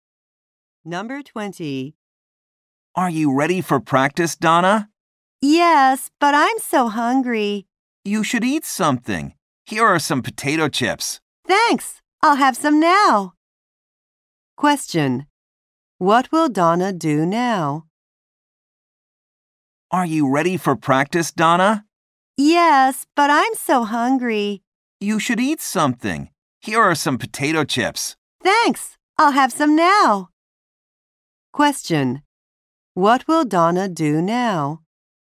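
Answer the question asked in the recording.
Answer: Eat some potato chips.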